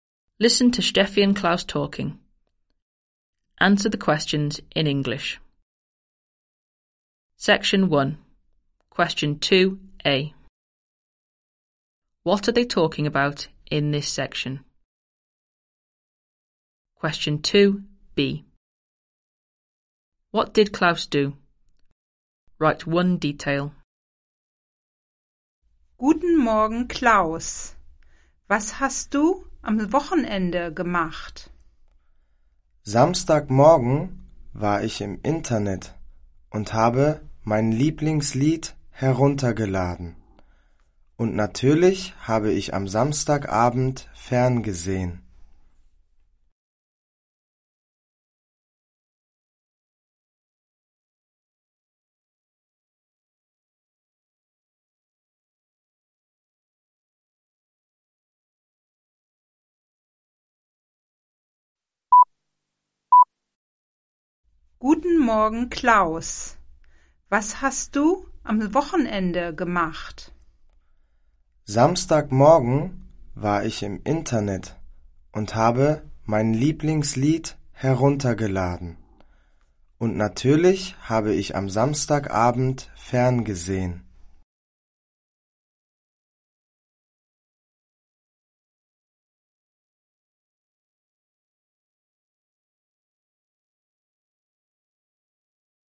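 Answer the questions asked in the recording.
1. What Klaus did at the weekend
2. Downloaded his favourite song / watched TV on Saturday evening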